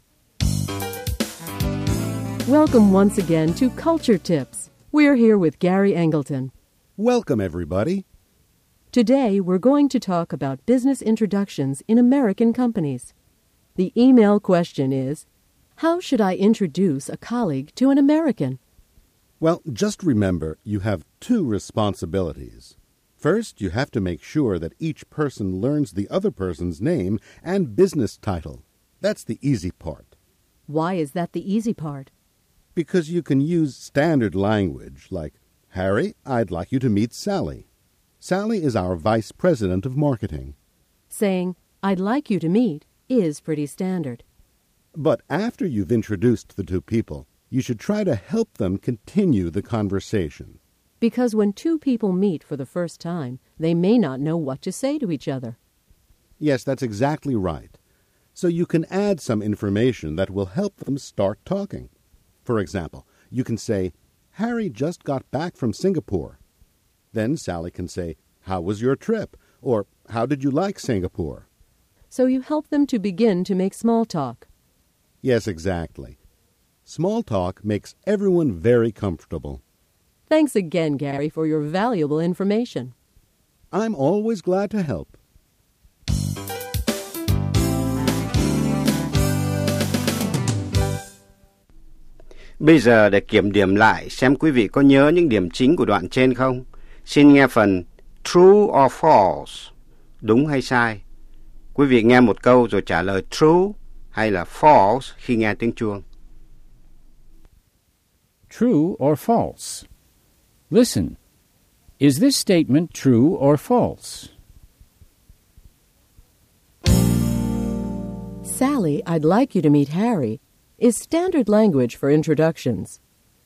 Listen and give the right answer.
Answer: True.